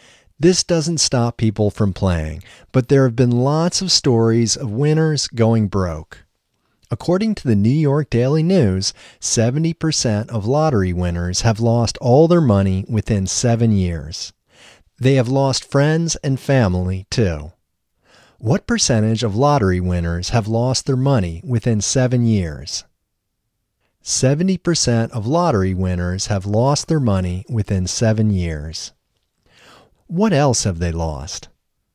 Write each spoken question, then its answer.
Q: What else have they lost?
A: They have lost friends and family, too.